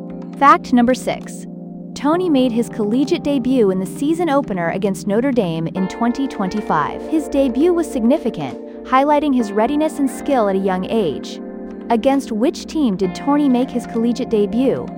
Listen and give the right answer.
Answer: Correct answer, Notre Dame.